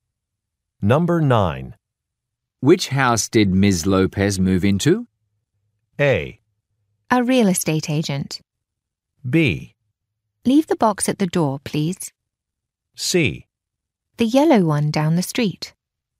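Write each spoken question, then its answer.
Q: Which house did Ms. Lopez move into?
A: C: The yellow one down the street.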